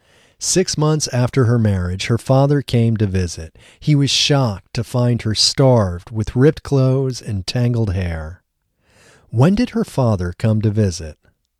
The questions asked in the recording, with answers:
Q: When did her father come to visit?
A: Her father came to visit 6 months after her marriage.